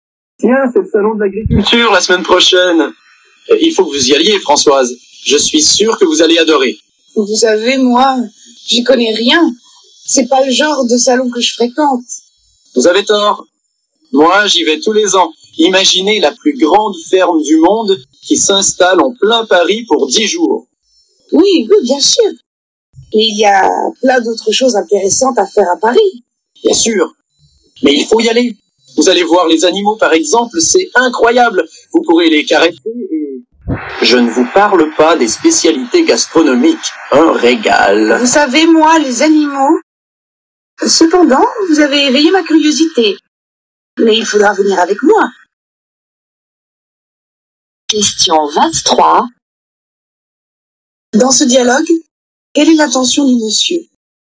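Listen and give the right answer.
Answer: Convaincre Françoise d'aller au salon de l'agriculture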